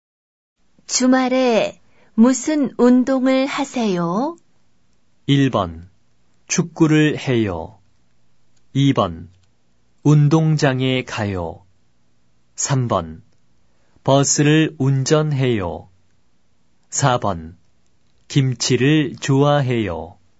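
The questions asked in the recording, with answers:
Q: 주말에 무슨 운동을 하세요?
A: 1: 축구를 해요.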